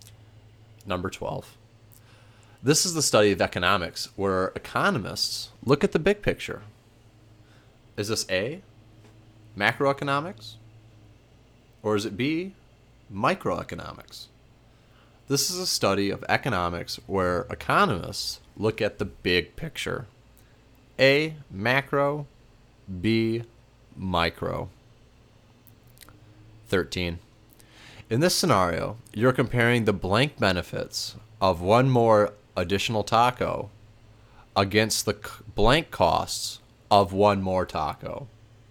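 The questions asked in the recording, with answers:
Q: This is the study of economics where economists look at the big picture.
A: A: macroeconomics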